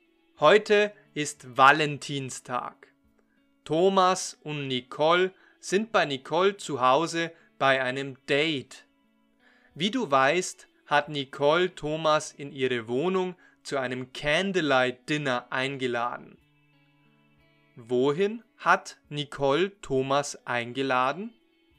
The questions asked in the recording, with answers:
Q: Wohin hat Nicole Thomas eingeladen?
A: In ihre Wohnung. Nicole hat Thomas in ihre Wohnung eingeladen.